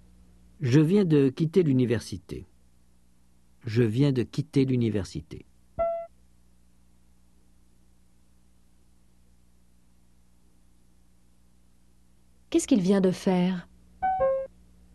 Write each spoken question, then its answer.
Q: Qu'est-ce qu'il vient de faire?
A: Il vient de quitter l'université.